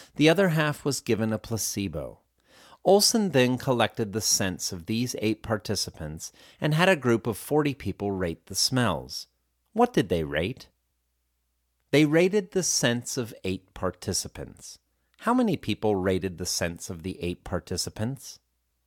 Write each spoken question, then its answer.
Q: How many people rated the scents of the 8 participants?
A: 40 people rated the scents of the 8 participants.